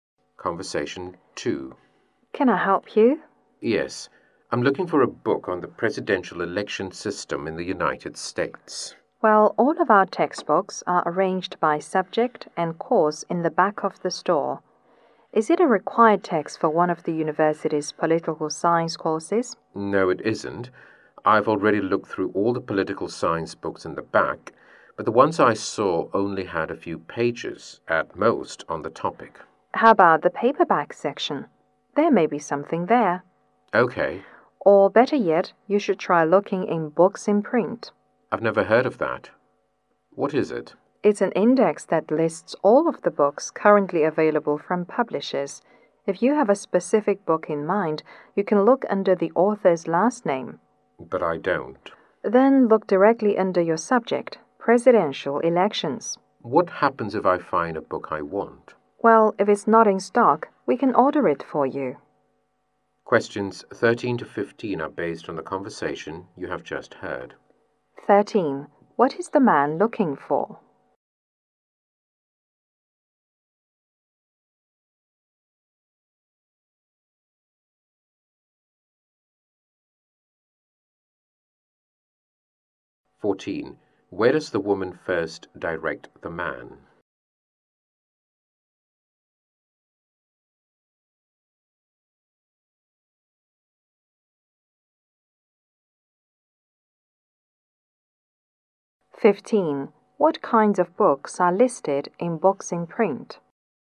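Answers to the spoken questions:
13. A book on the US presidential election system
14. To the textbooks at the back of the store
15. All books currently available from publishers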